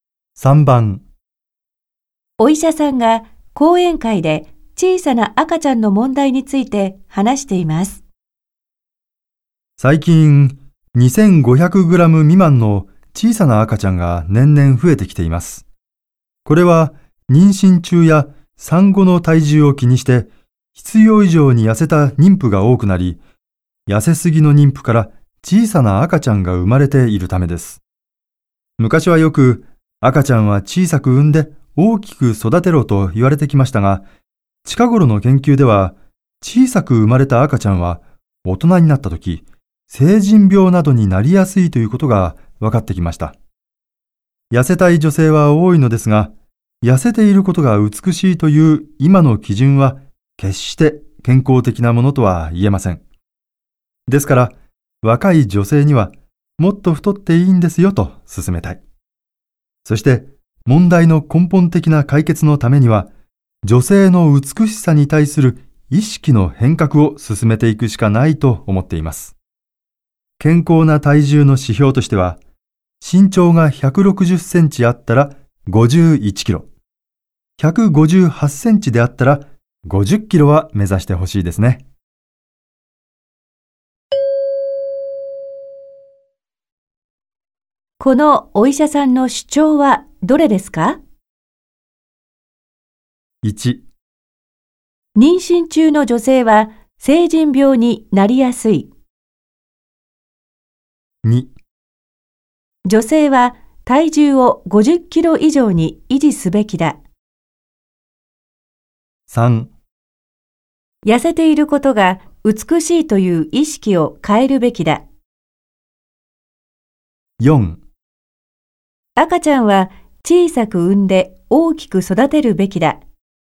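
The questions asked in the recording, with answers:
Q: このお医者さんの主張はどれですか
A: 3: 痩せていることが美しいという意識を変えるべきだ。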